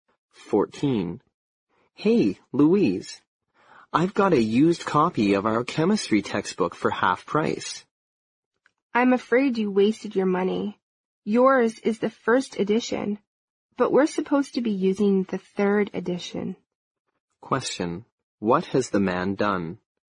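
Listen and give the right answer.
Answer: He bought the wrong (old) edition of the chemistry textbook.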